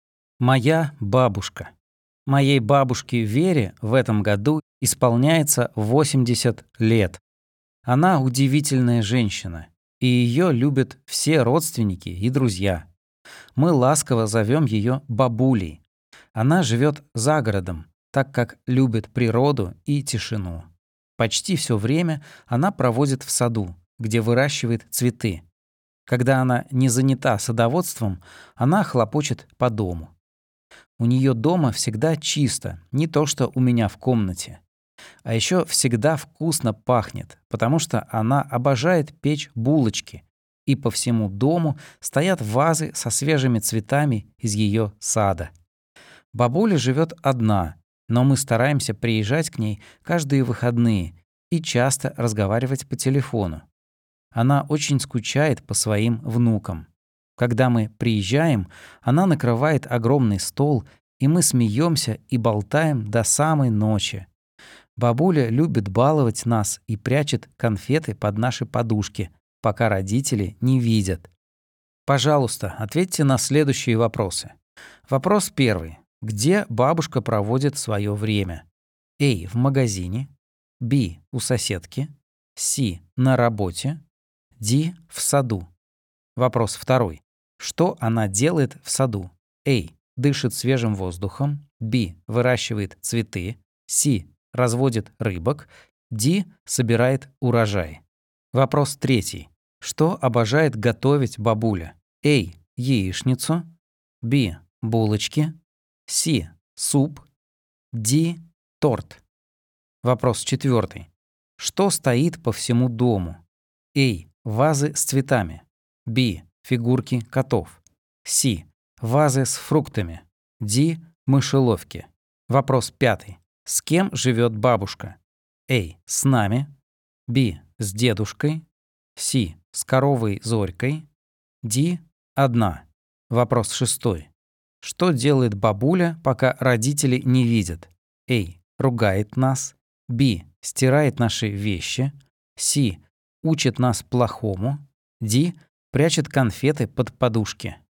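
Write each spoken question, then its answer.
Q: Где бабушка проводит свое время?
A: Д: В саду

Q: Что она делает в саду?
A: Б: Выращивает цветы

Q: Что обожает готовить бабуля?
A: Б: Булочки

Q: Что стоит по всему дому?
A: А: Вазы с цветами

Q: С кем живет бабушка?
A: Д: Одна

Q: Что делает бабуля, пока родители не видят?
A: Д: Прячет конфеты под подушки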